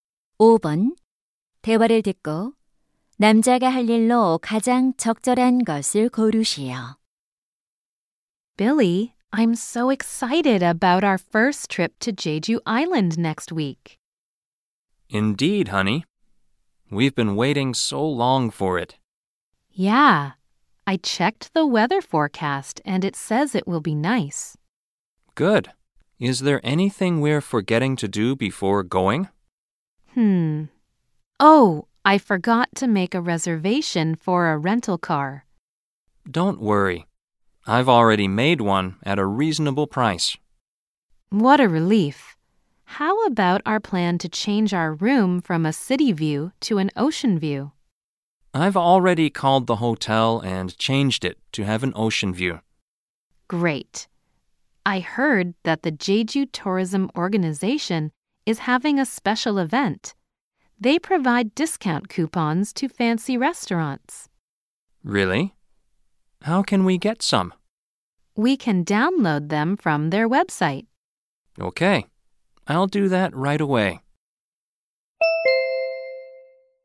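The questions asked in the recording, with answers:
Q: 대화를 듣고 남자가 할 일로 가장 적절한 것을 고르시오.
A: 웹사이트에서 할인 쿠폰 내려받기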